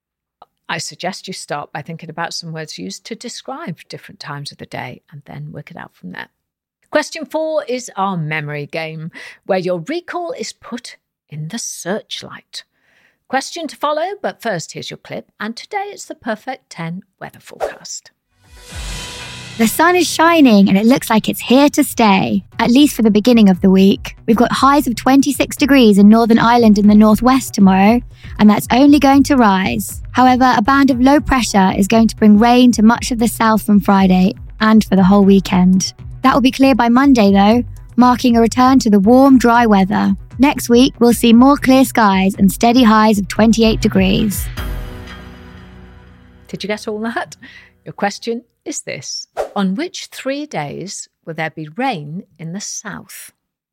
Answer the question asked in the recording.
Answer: The answer is Friday, Saturday and Sunday.